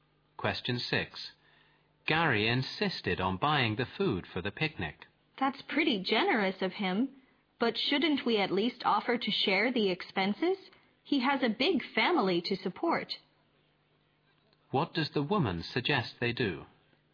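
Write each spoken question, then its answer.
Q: What does the woman suggest they do?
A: Offer to share the cost of the food with Gary.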